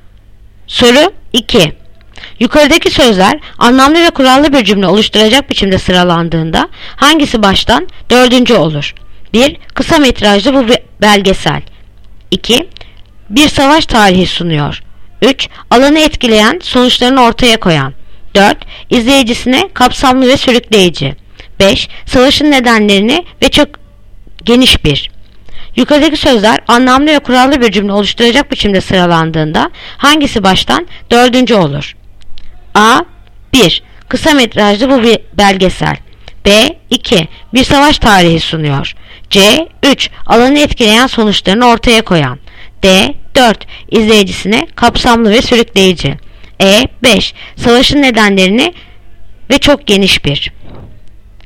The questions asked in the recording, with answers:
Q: Yukarıdaki sözler anlamlı ve kurallı bir cümle oluşturacak biçimde sıralandığında hangisi baştan dördüncü olur?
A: Yanıt Diyarbakır. 4. İzleyicisine kapsamlı ve sürükleyici.